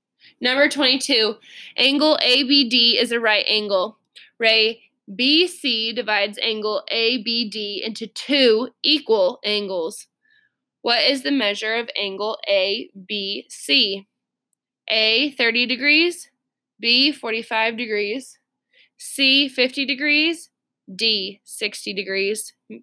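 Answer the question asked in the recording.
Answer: B: 45 degrees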